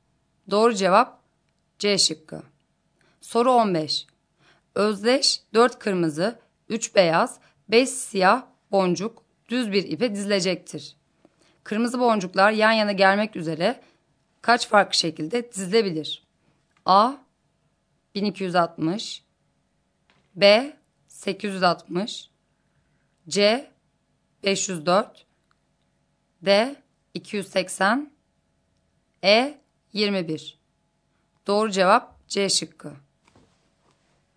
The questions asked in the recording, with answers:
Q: Kırmızı boncuklar yan yana gelmek üzere kaç farklı şekilde dizilebilir?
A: Doğru cevap C şıkkı.